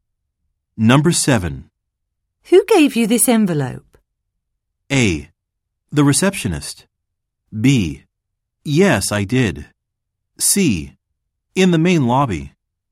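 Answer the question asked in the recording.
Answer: A: The receptionist.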